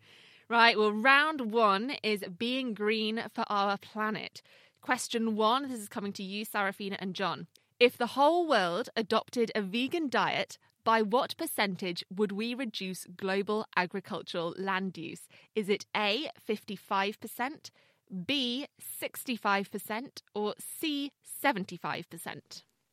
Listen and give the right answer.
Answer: The answer is C, 75%.